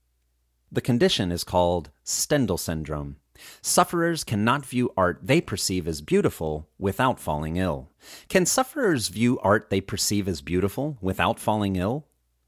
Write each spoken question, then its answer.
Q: Can sufferers view art they perceive as beautiful without falling ill?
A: No, sufferers can't view art they perceive as beautiful without falling ill.